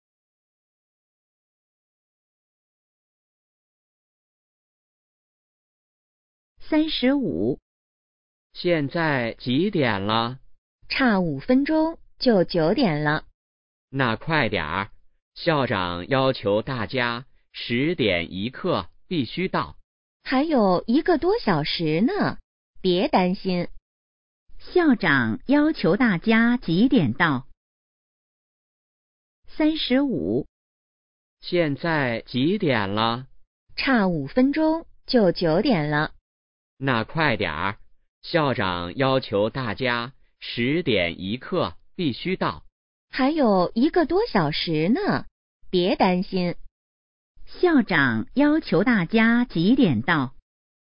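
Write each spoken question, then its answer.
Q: 校长要求大家几点到?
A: 10点1刻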